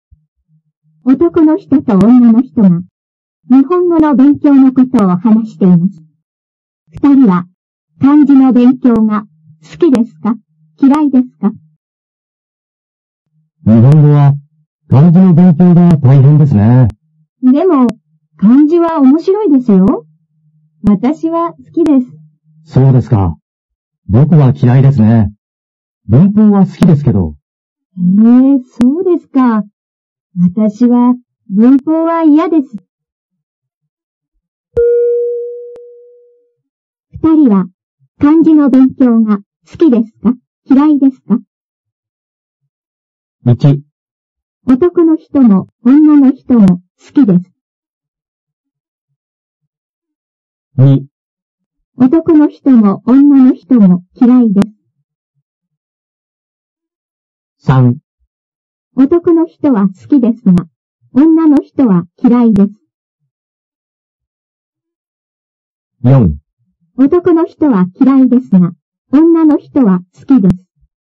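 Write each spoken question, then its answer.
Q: 二人は漢字の勉強が好きですか?嫌いですか?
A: 4: 男の人は嫌いですが、女の人は好きです。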